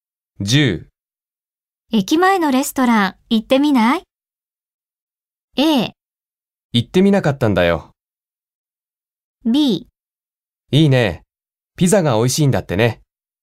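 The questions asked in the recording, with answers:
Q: 駅前のレストラン行ってみない?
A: B: いいね、ピザが美味しいんだってね。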